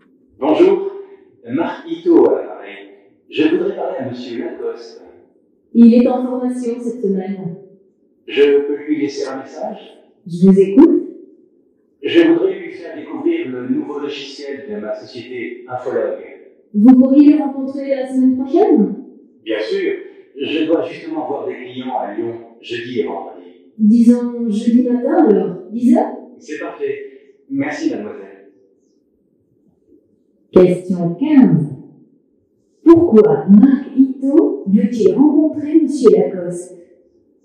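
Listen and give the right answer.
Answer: Pour lui faire découvrir le nouveau logiciel de sa société Infolog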